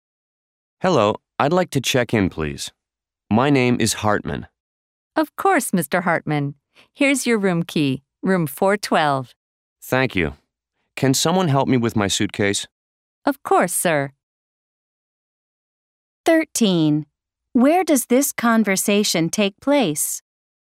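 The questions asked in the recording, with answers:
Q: Where does this conversation take place?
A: At a hotel (front desk)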